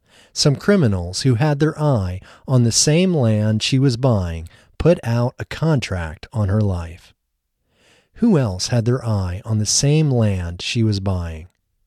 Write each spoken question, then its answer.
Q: Who else had their eye on the same land she was buying?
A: Some criminals had their eye on the same land she was buying.